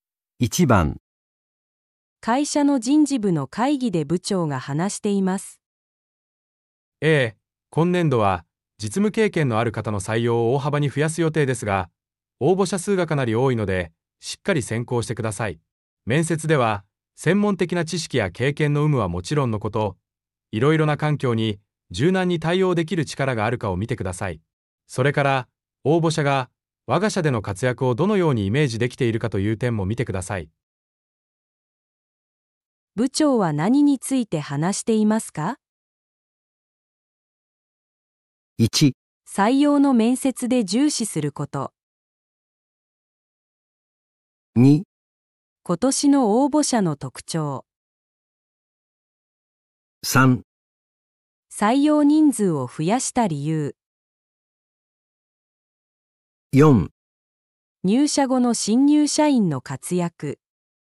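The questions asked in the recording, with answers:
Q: 部長は何について話していますか?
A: 1: 採用の面接で重視すること。

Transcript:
会社の人事部の会議で部長が話しています。
男:えー、今年度は実務経験のある方の採用を大幅に増やす予定ですが、応募者数がかなり多いのでしっかり選考してください。面接では専門的な知識や経験の有無はもちろんのこと、いろいろな環境に柔軟に対応できる力があるかを見てください。それから、応募者がわが社での活躍をどのようにイメージできているかという点も見てください。
1.採用の面接で重視すること
2.今年の応募者の特徴
3.採用人数を増やした理由
4.入社後の新入社員の活躍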